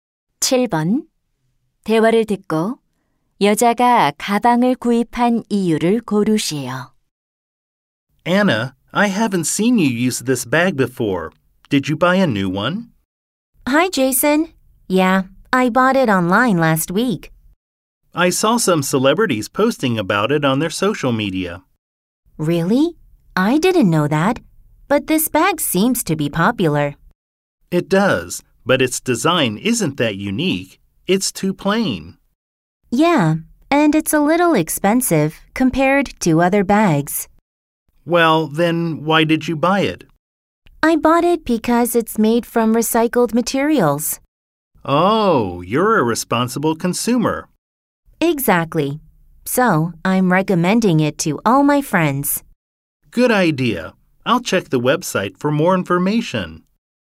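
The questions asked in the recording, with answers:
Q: 대화를 듣고 여자가 가방을 구입한 이유를 고르시오.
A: 재활용 소재로 만들어져서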